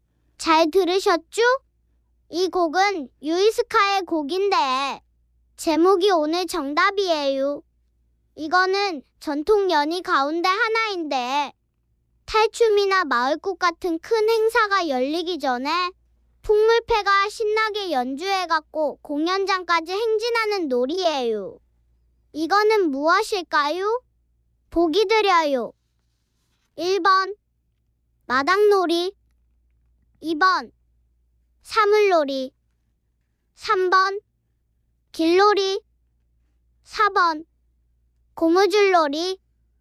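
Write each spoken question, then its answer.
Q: 이거는 무엇일까요? 보기 드려요. 1번 마당놀이, 2번 사물놀이, 3번 길놀이, 4번 고무줄놀이.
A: 3: 길놀이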